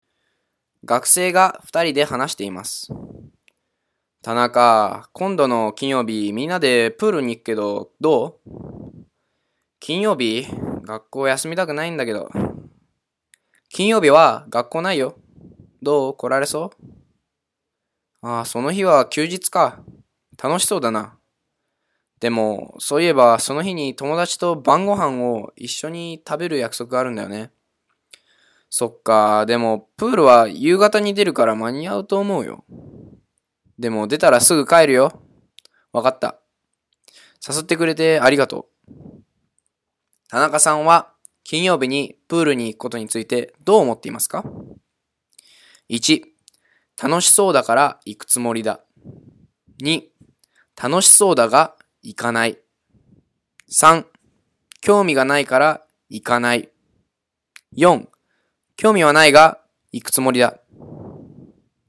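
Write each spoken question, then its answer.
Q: 田中さんは金曜日にプールに行くことについてどう思っていますか ?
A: 1: 楽しそうだから行くつもりだ。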